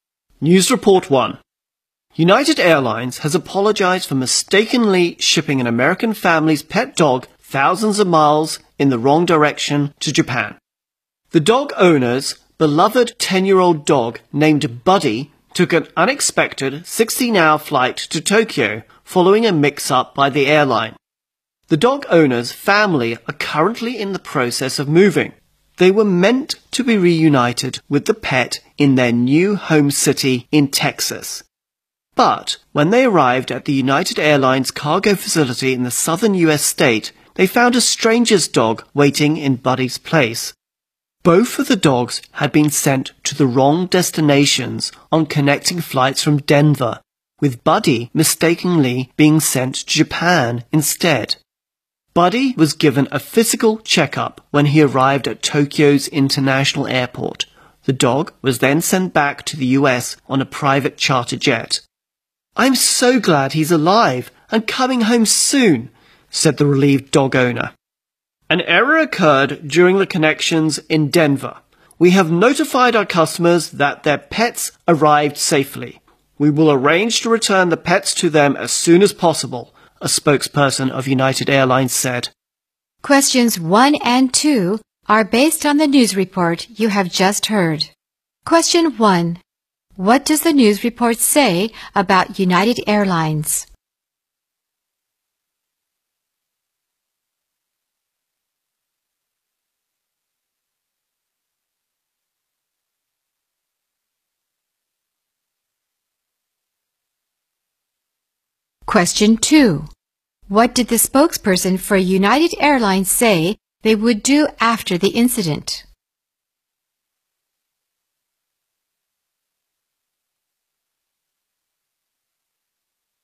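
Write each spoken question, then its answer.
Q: What does the news report say about United Airlines?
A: It mistakenly shipped a family's pet dog to Japan, and it apologized

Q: What did the spokesperson for United Airlines say they would do after the incident?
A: Return the pets to their owners as soon as possible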